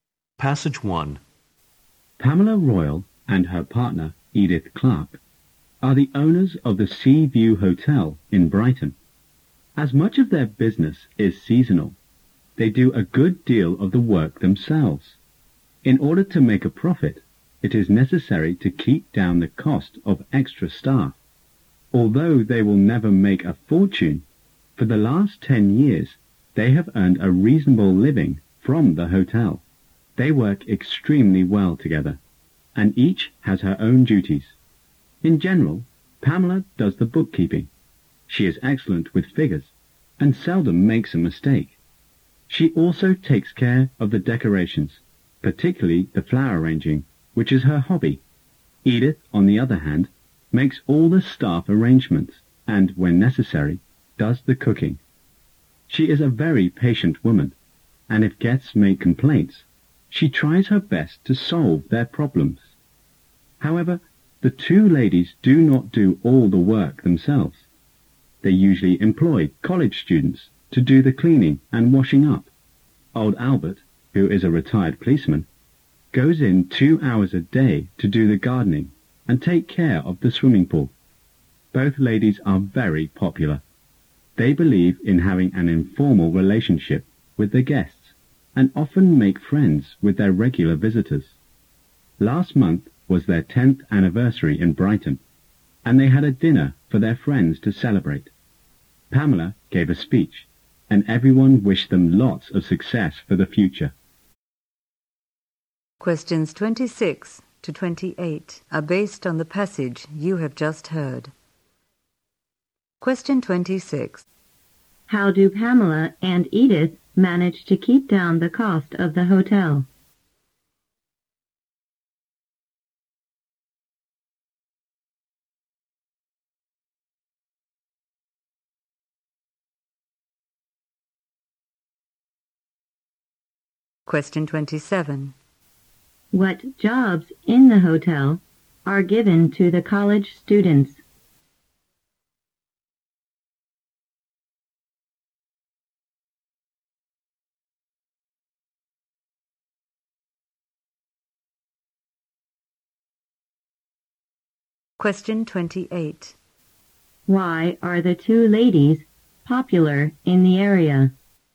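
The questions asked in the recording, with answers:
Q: How do Pamela and Edith manage to keep down the cost of the hotel?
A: They do much of the work themselves

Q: What jobs in the hotel are given to the college students?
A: Cleaning and washing up

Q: Why are the two ladies popular in the area?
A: They have an informal, friendly relationship with guests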